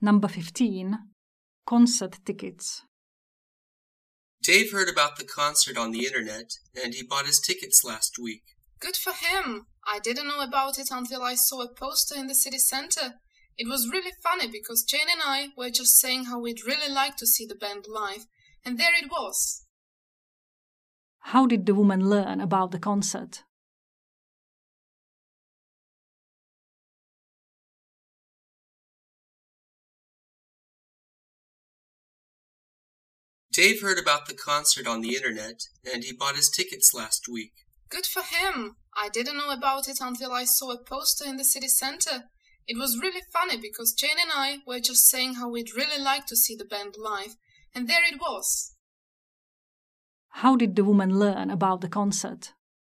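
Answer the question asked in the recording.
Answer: She saw a poster in the city center.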